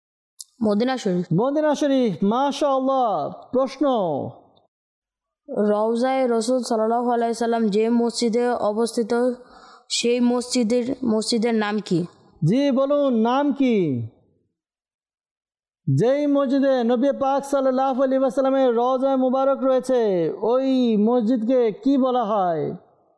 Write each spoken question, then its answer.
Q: রওজায়ে রাসূল সাল্লাল্লাহু আলাইহি সাল্লাম যে মসজিদে অবস্থিত সেই মসজিদের নাম কি?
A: মসজিদে নববী